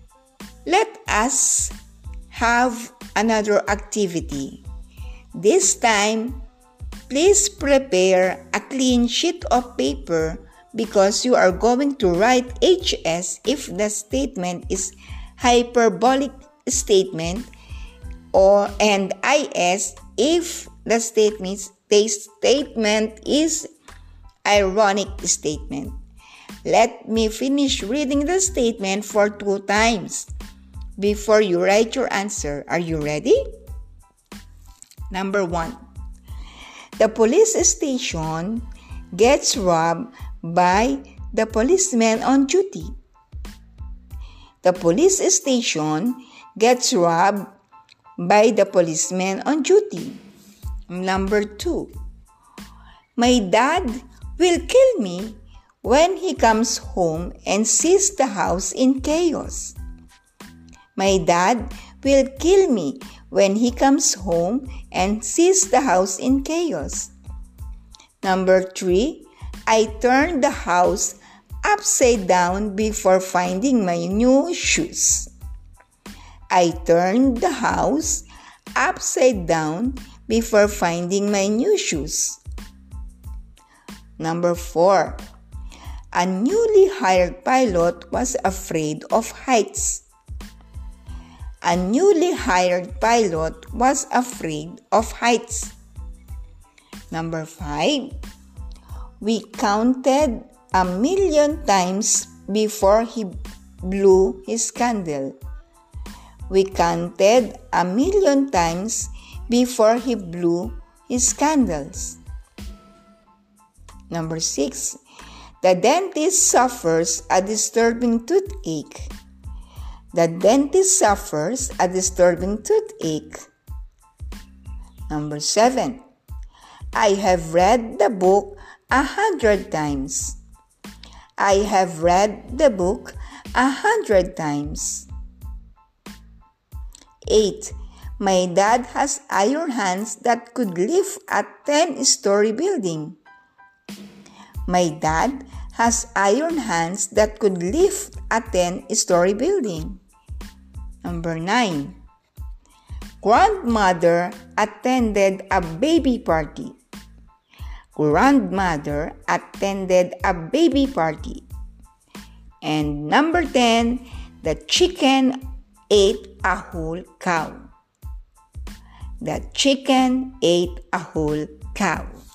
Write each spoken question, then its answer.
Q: the police station gets robbed by the policeman on duty.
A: The answer is IS.

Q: my dad will kill me when he comes home and sees the house in chaos.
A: The answer is HS.

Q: I turned the house upside down before finding my new shoes.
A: The answer is HS.

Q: a newly hired pilot was afraid of heights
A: The answer is IS.

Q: we counted a million times before he blew his candle.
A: The answer is HS.

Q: the dentist suffers a disturbing toothache.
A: The answer is IS.

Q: I have read the book a hundred times.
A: The answer is HS.

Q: my dad has iron hands that could lift a 10 story building.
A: The answer is HS.

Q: Grandmother attended a baby party.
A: The answer is IS.